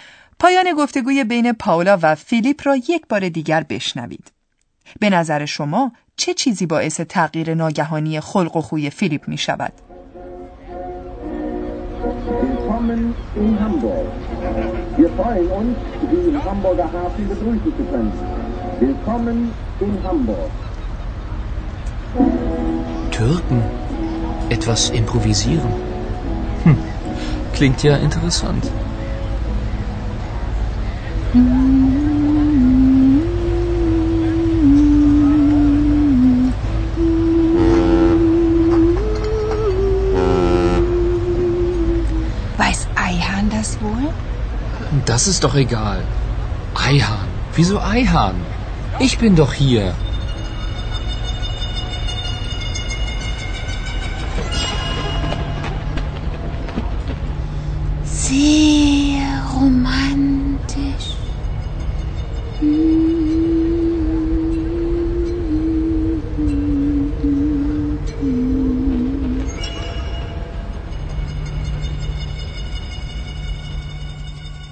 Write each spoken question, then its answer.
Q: به نظر شما چه چیزی باعث تغییر ناگهانی خلق و خوی فیلیپ می شود؟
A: یادآوری نام همکارشان آیهان از سوی پاولا عملا آن چیزی است که خلق و خوی فیلیپ را تغییر می دهد.